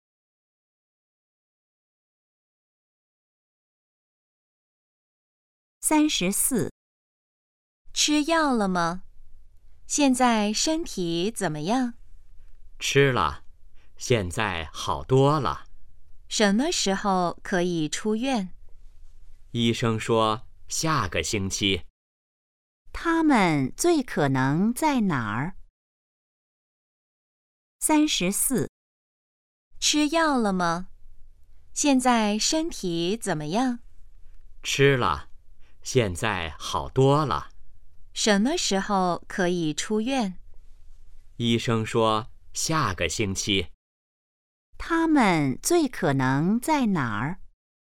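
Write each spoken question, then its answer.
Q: 他们最可能在哪儿?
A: 医院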